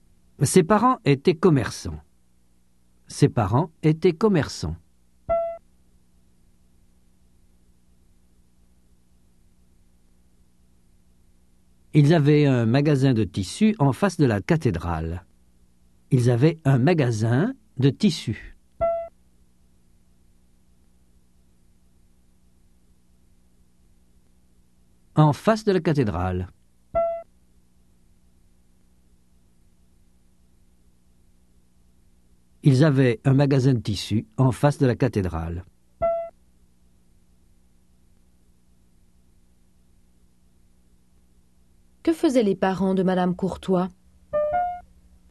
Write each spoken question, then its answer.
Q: Que faisaient les parents de Madame Courtois ?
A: Ils étaient commerçants.